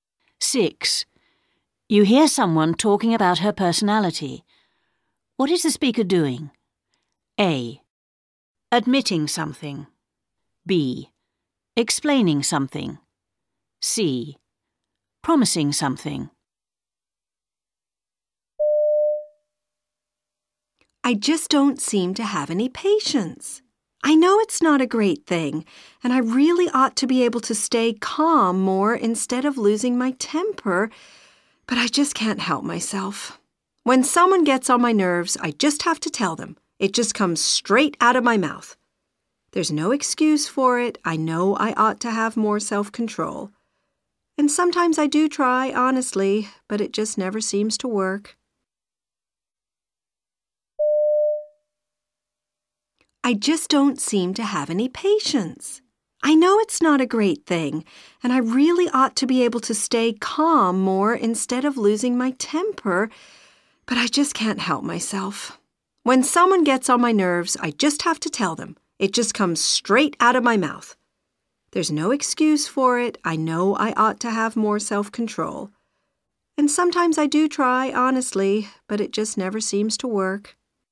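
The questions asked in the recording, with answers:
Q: What is the speaker doing?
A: A: Admitting something.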